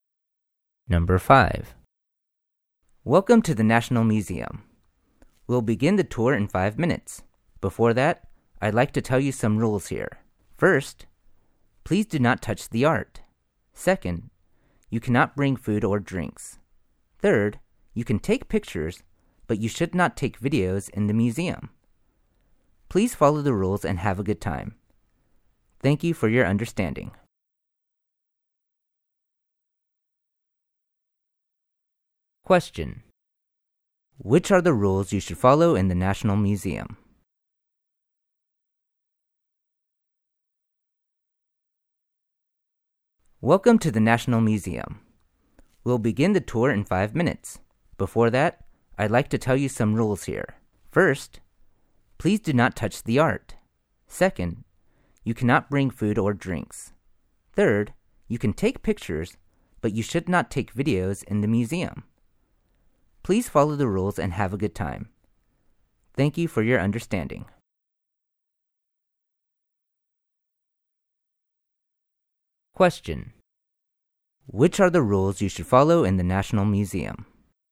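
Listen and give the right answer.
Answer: Don't touch the art, don't bring food or drinks, and don't take videos.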